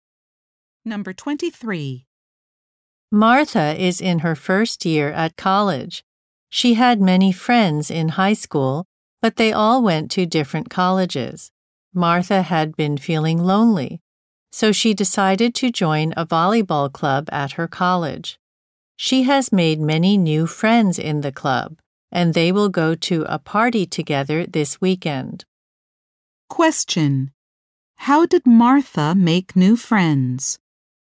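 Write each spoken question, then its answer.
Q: How did Martha make new friends?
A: She joined a volleyball club at her college.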